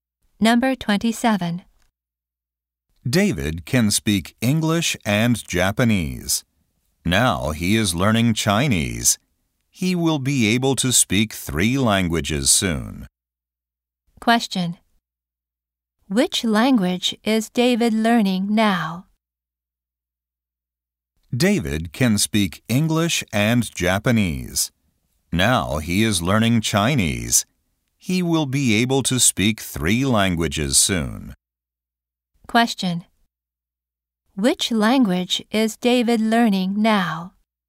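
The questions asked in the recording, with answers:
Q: Question. Which language is David learning now?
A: Chinese.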